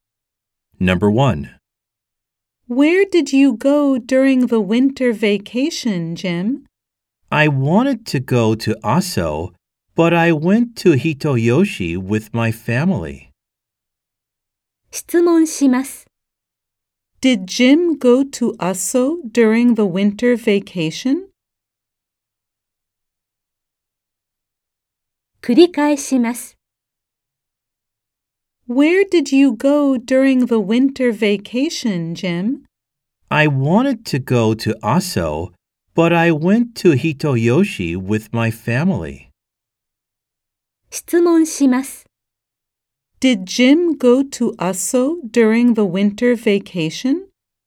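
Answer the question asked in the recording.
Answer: No, he didn't. He went to Hitoyoshi.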